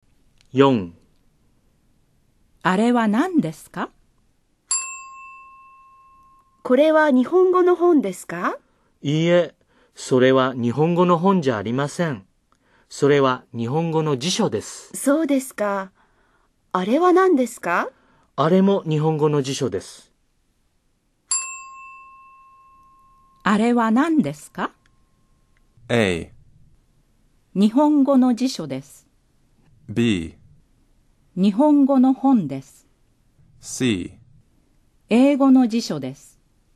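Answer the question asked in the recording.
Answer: A: 日本語の辞書です。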